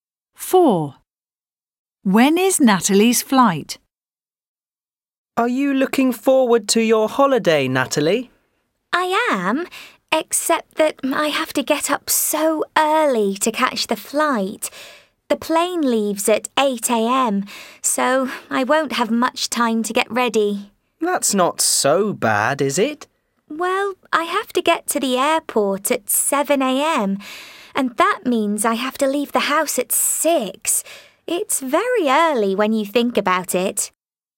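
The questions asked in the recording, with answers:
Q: When is Natalie's flight?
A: 8 a.m.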